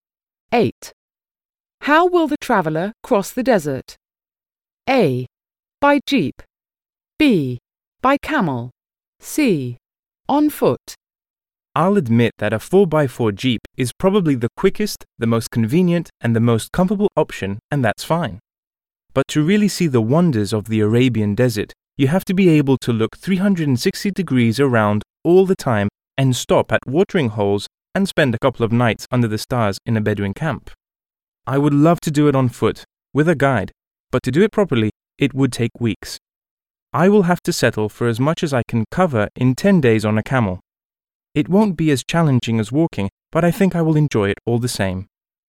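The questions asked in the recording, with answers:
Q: How will the traveller cross the desert?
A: B: By camel.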